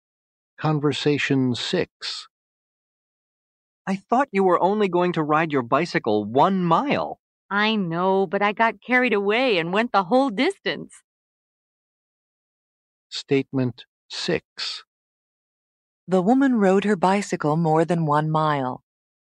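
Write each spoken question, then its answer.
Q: The woman rode her bicycle more than 1 mile.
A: True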